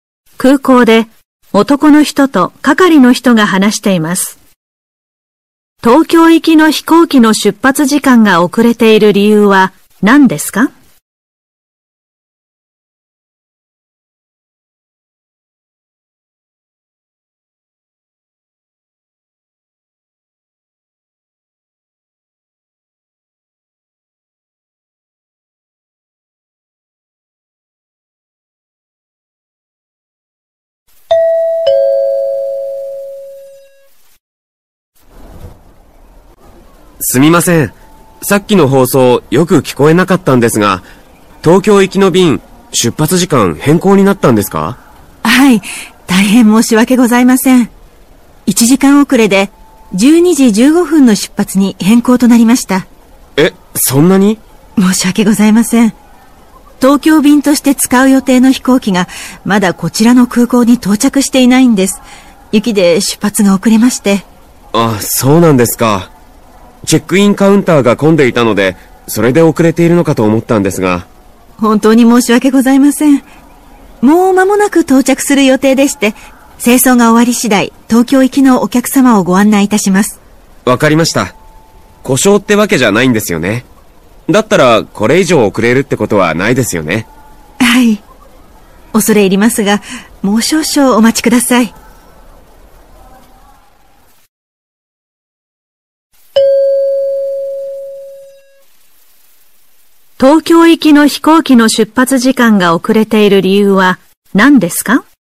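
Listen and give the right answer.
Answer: 東京便に使う飛行機が雪で遅れ、まだ空港に到着していないから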